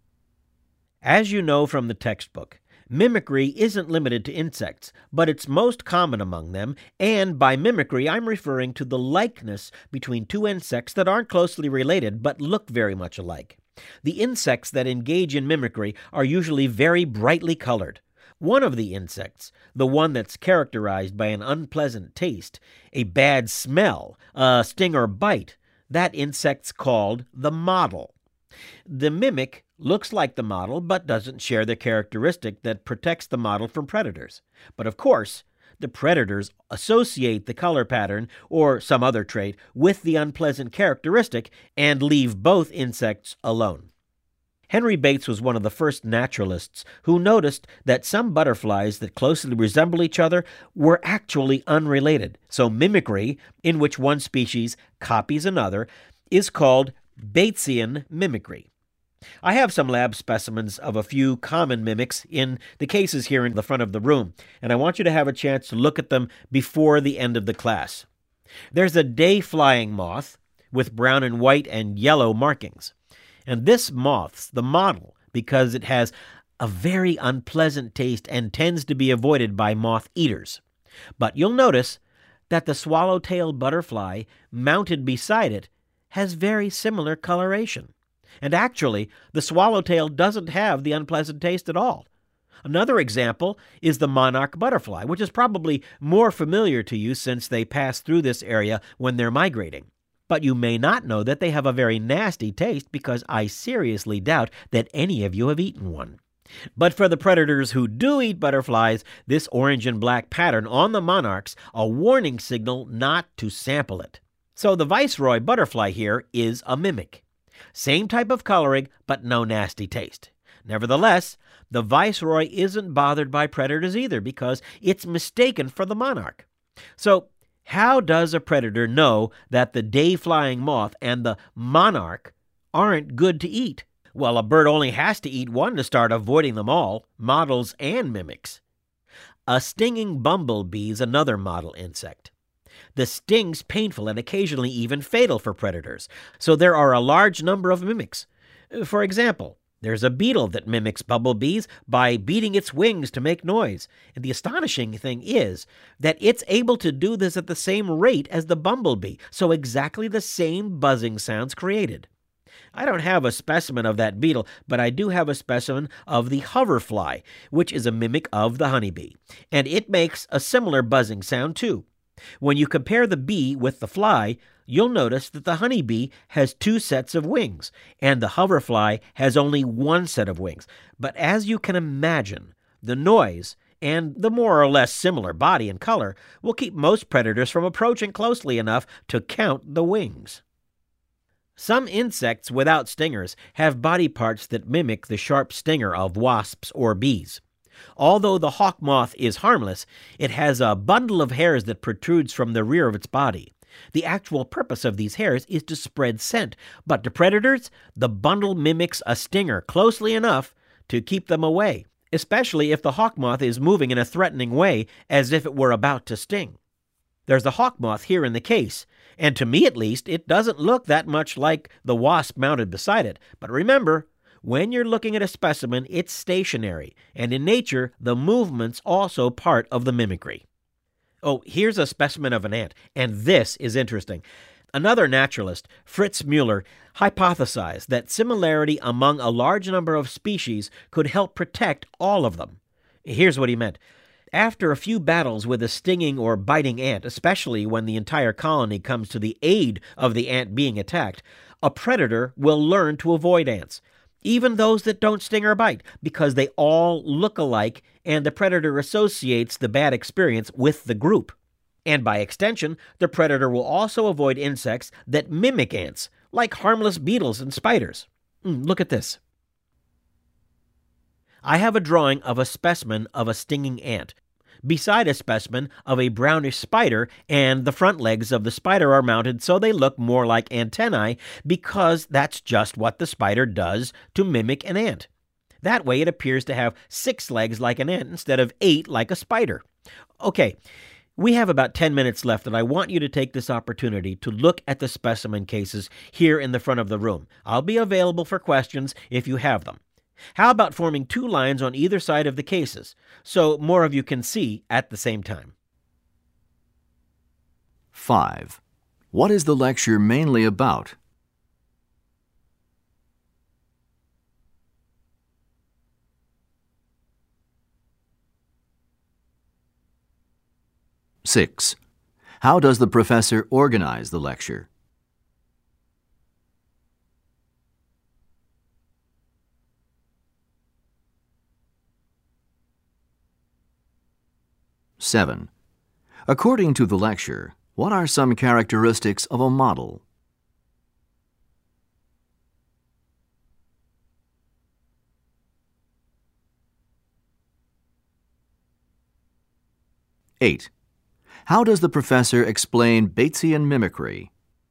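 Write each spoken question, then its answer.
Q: What is the lecture mainly about?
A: Mimicry among insects (models and mimics)

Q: According to the lecture, what are some characteristics of a model?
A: An unpleasant taste, a bad smell, or a sting or bite; often brightly colored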